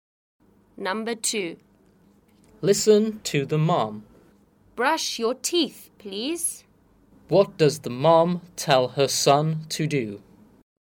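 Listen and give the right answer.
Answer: Brush his teeth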